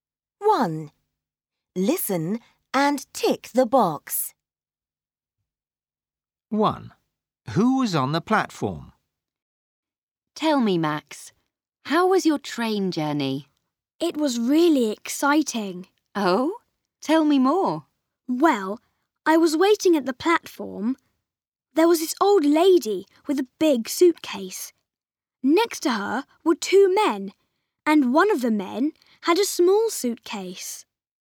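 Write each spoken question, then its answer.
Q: Who was on the platform?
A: An old lady with a big suitcase and two men, one with a small suitcase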